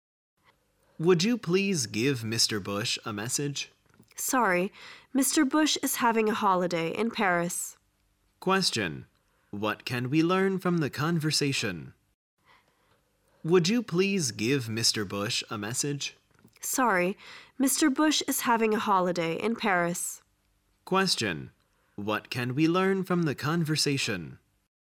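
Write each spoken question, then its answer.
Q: What can we learn from the conversation?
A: Mr. Bush is on holiday in Paris.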